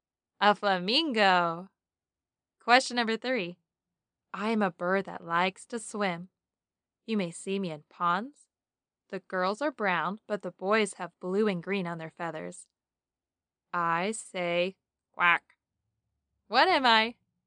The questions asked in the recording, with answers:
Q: What am I?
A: Duck.